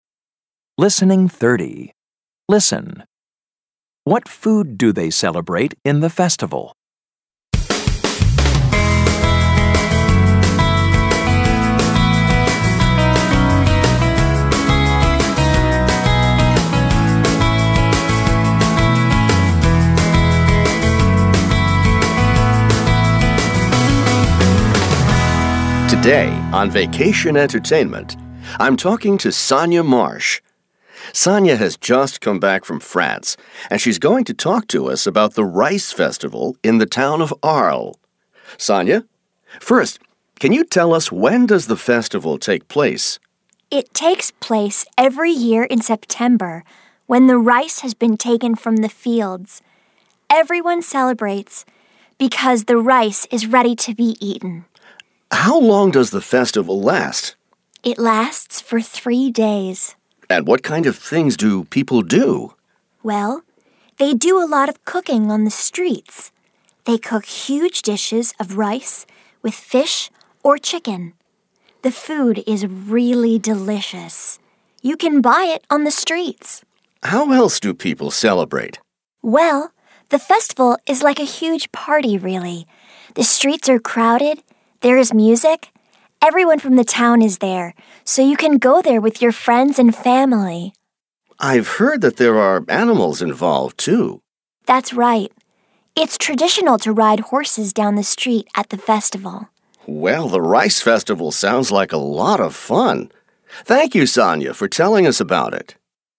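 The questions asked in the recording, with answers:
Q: What food do they celebrate in the festival?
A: Rice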